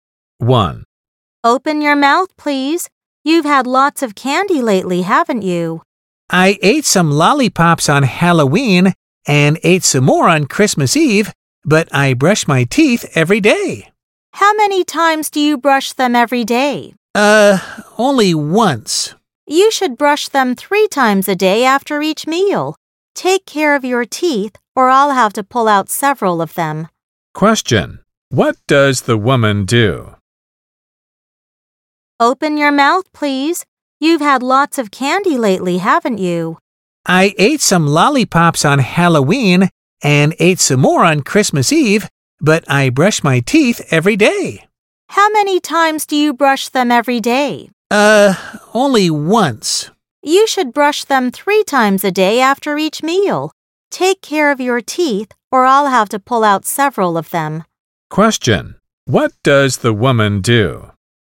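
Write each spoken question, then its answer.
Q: What does the woman do?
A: She is a dentist.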